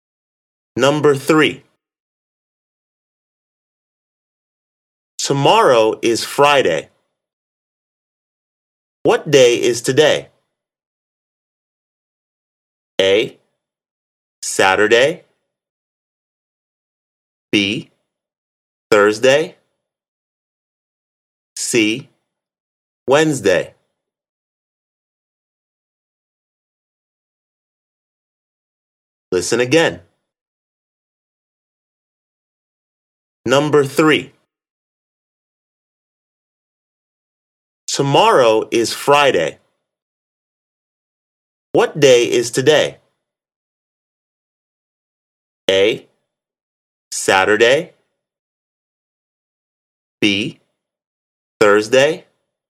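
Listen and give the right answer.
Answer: B: Thursday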